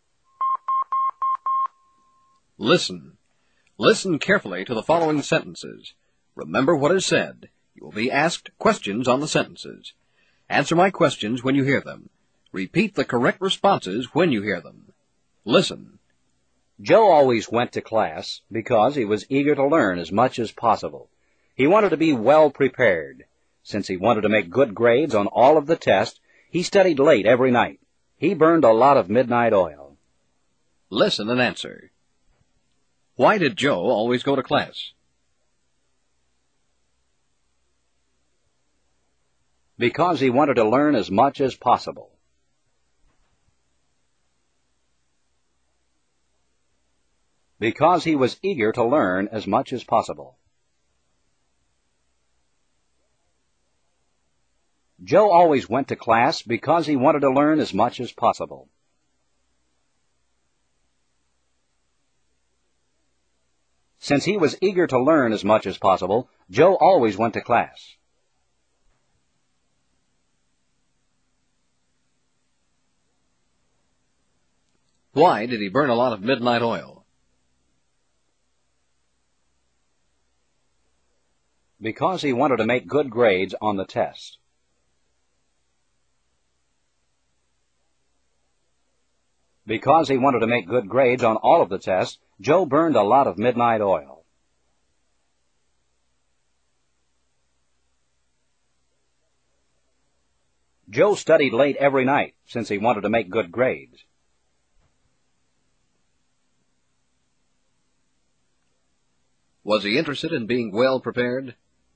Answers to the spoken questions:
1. Because he was eager to learn as much as possible.
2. Because he wanted to make good grades on the test.
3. Yes, he was.